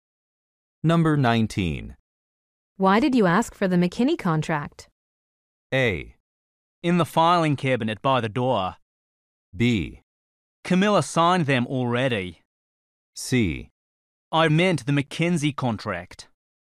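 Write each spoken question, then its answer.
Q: Why did you ask for the McKinney contract?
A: C: I meant the McKenzie contract.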